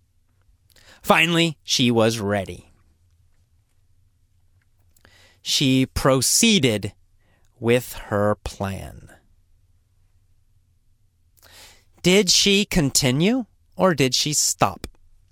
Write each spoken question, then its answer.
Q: Did she continue or did she stop?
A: She continued.